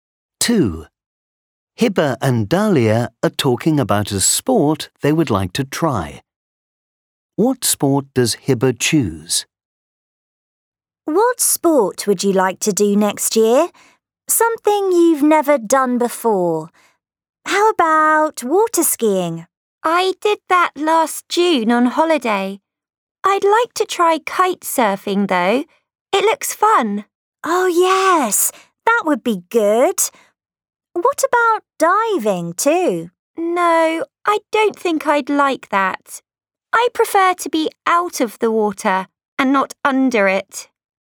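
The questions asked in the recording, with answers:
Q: What sport does Hibba choose?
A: kite surfing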